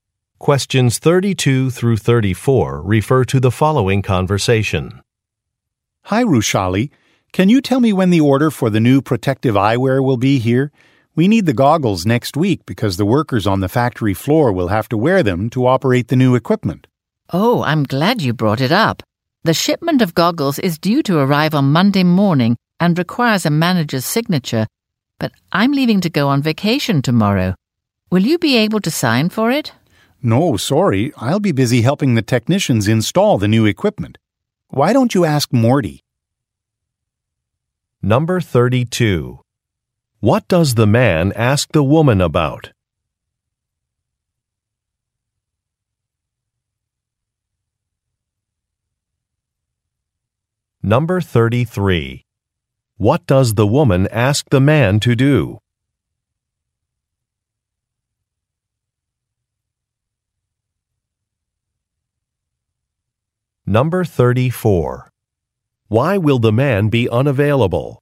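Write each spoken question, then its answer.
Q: What does the man ask the woman about?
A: When the order of new protective eyewear (goggles) will arrive

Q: What does the woman ask the man to do?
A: Sign for the goggle shipment

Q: Why will the man be unavailable?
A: He will be helping technicians install new equipment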